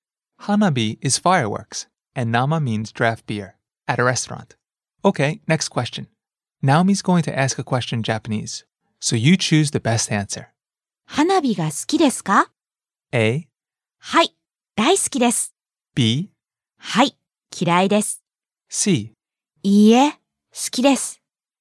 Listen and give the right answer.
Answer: A. はい、大好きです。Yes, I love it.